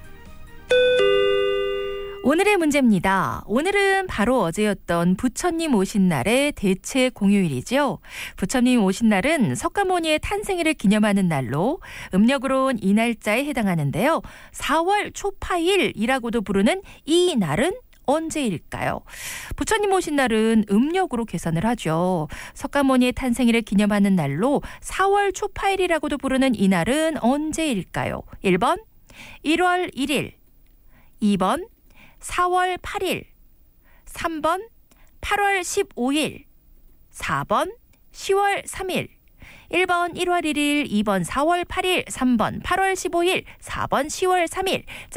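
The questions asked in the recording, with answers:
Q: 4월 초파일이라고도 부르는 이 날은 언제일까요?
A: 2번: 4월 8일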